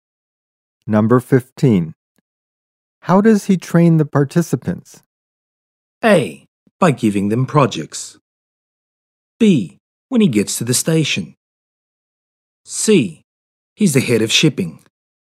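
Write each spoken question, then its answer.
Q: How does he train the participants?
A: A: By giving them projects.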